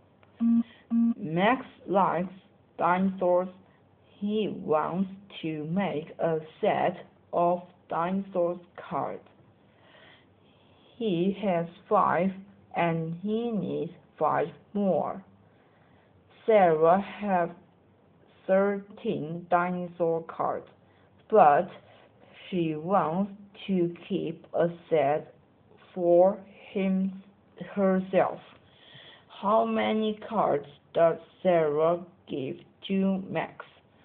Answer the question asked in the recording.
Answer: Sarah gave Max 3 cards because 13 takes away 3 leaves 10.